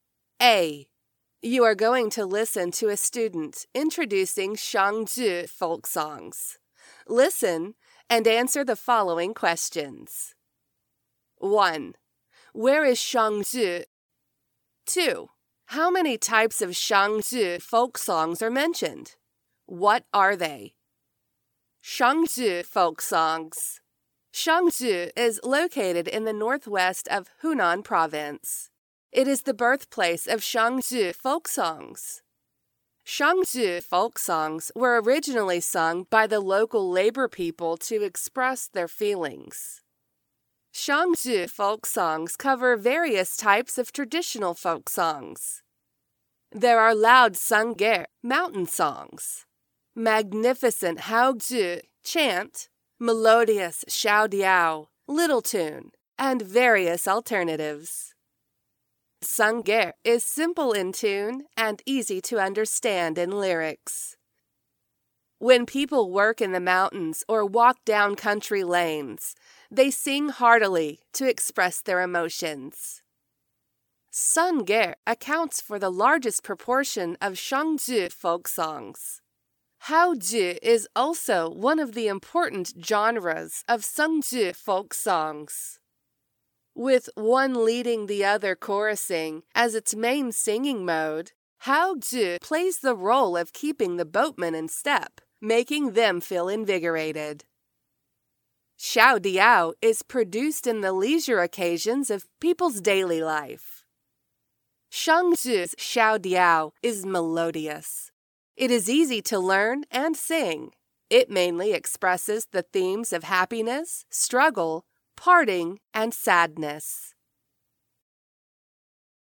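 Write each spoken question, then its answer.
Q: Where is Shangzhi?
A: In the northwest of Hunan province

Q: How many types of Shangzhi folk songs are mentioned?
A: Three

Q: What are they?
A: Sangge (mountain songs), haozhi (chant), and xiaodiao (little tune)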